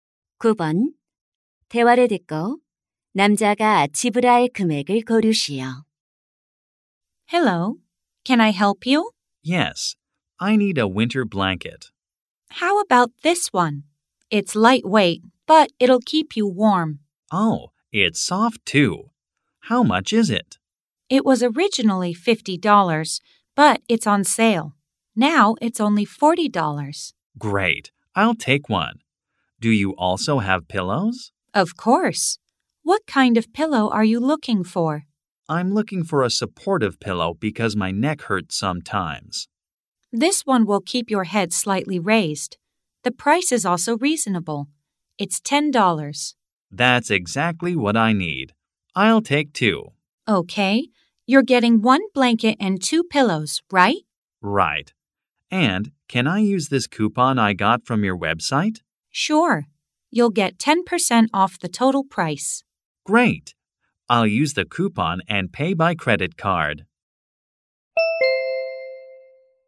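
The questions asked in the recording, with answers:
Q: 대화를 듣고 남자가 지불할 금액을 고르시오.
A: $54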